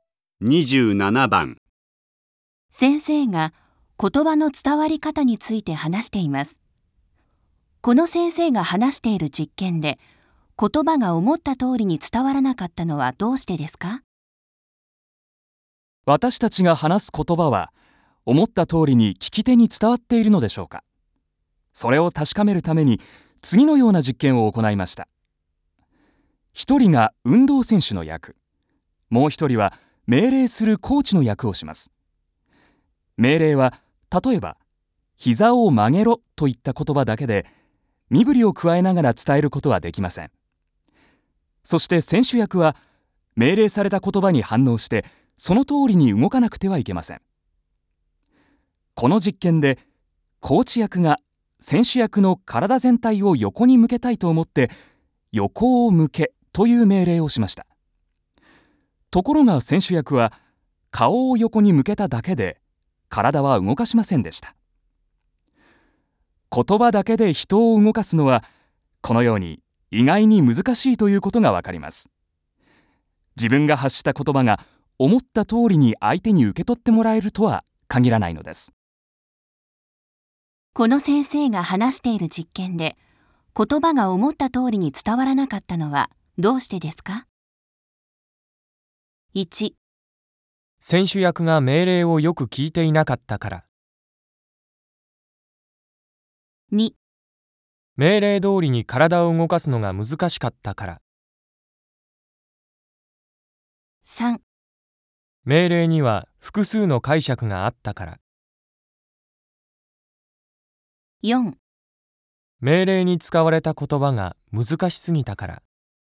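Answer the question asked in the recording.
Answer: 3: 命令には複数の解釈があったから。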